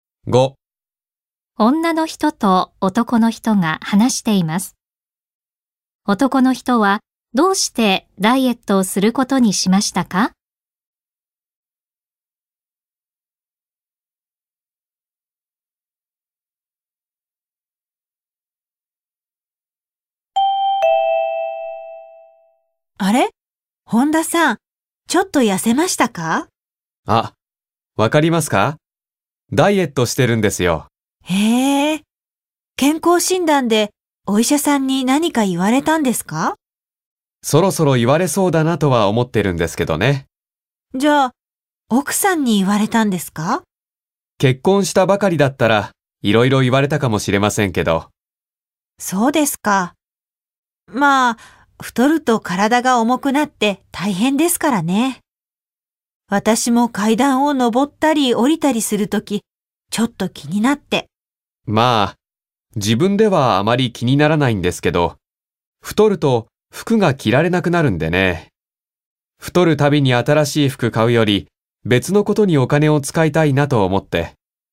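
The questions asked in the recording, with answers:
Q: 男の人はどうしてダイエットをすることにしましたか?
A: 太ると服が着られなくなり、新しい服を買うより別のことにお金を使いたいから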